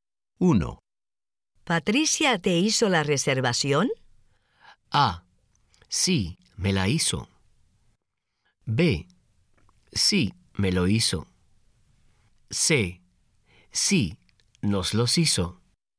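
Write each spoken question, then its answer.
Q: ¿Patricia te hizo la reservación?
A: A: Sí, me la hizo.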